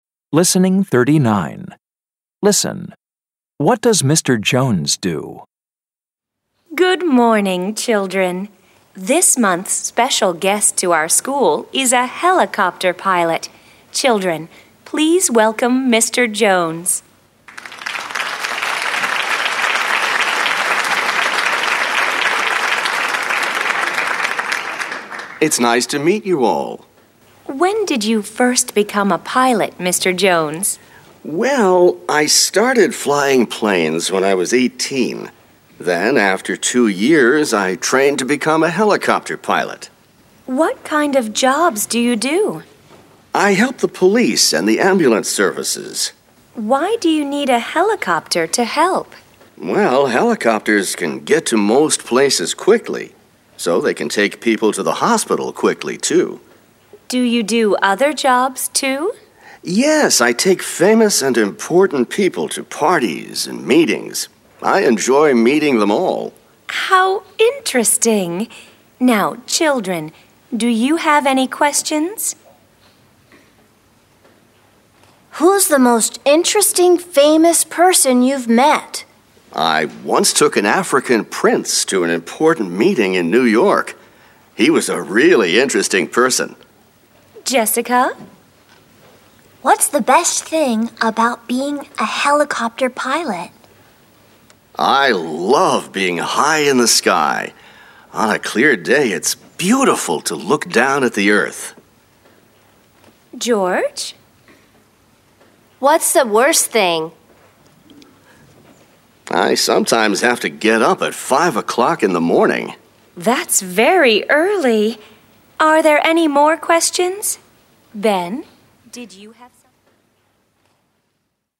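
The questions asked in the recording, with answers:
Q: What does Mr. Jones do?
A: He is a helicopter pilot.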